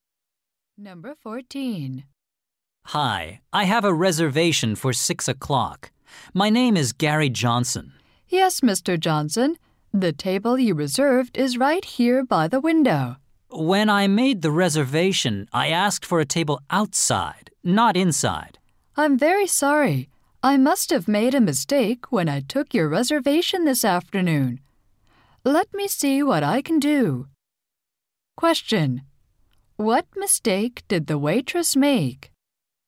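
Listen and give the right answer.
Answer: She reserved an inside table, not an outside one.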